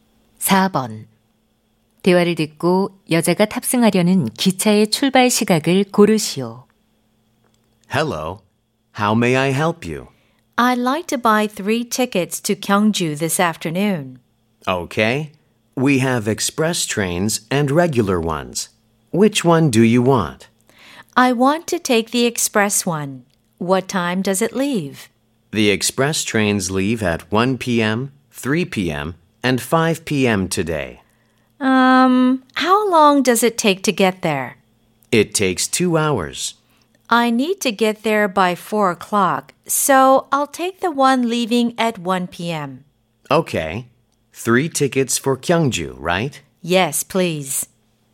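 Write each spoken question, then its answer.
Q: 대화를 듣고 여자가 탑승하려는 기차의 출발 시각을 고르시오.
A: 오후 1시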